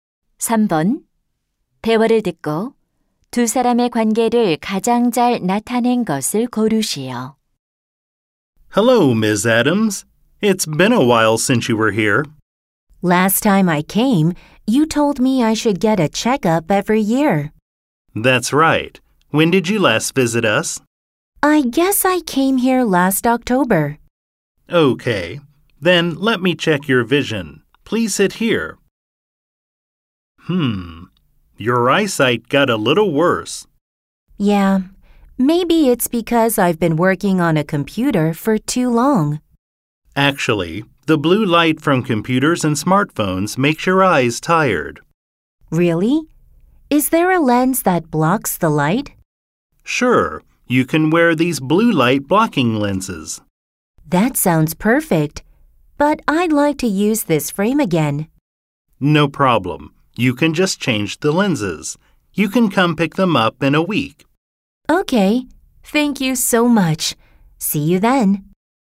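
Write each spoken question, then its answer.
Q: 대화를 듣고 두 사람의 관계를 가장 잘 나타낸 것을 고르시오.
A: 안경사 - 손님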